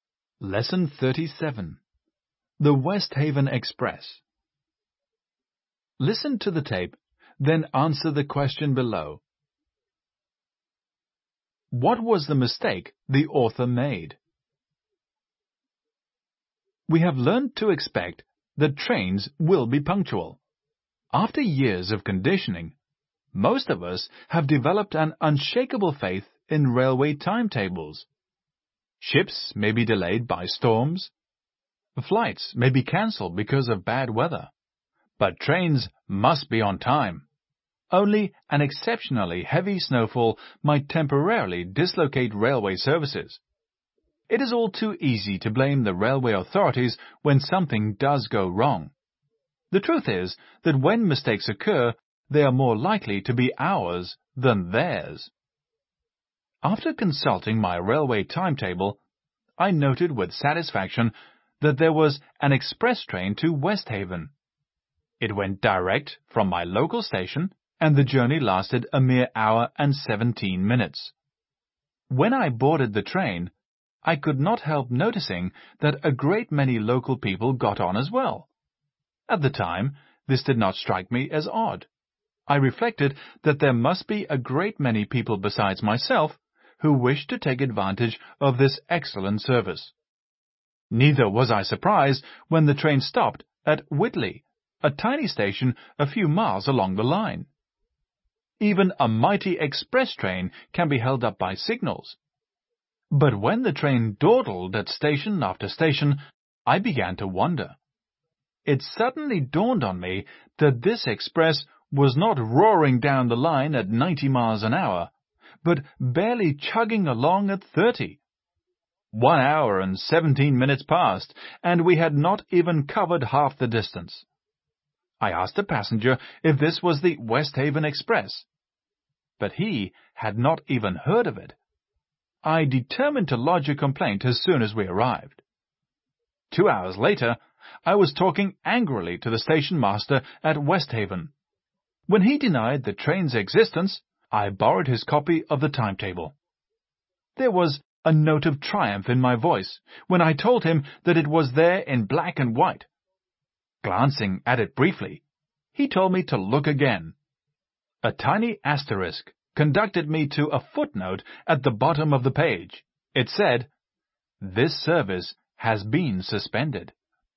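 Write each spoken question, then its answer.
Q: What was the mistake the author made?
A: He didn't notice the footnote saying the express service had been suspended, so he caught a slow train.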